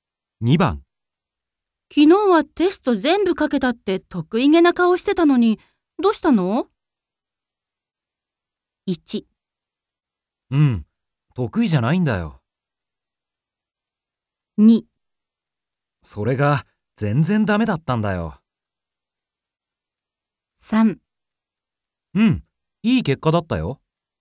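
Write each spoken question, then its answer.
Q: 昨日はテスト全部かけたって得意げな顔してたのに、どうしたの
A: 2: それが全然ダメだったんだよ。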